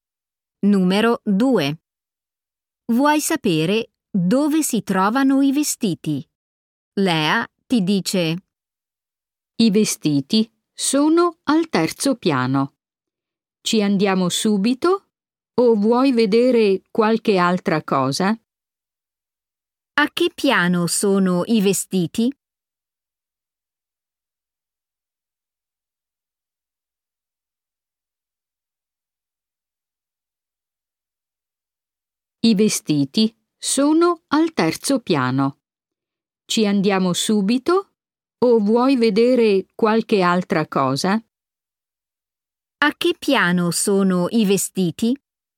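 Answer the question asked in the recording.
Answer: al terzo piano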